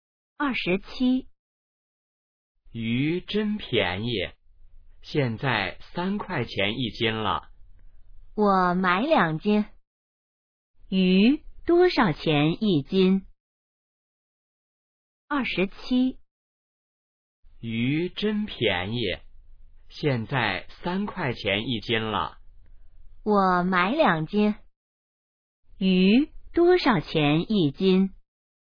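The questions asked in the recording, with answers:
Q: 鱼多少钱一斤?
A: 3块钱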